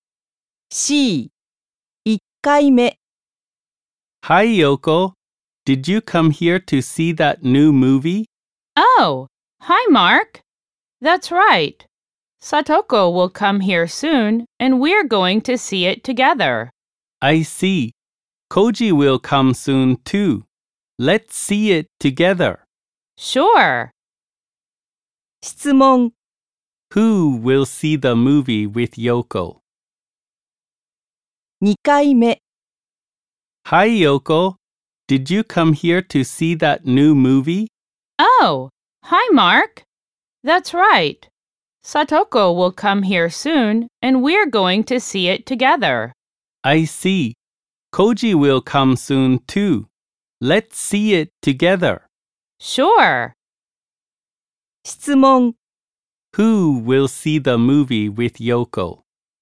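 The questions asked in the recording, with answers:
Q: Who will see the movie with Yoko?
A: Satoko, Mark and Koji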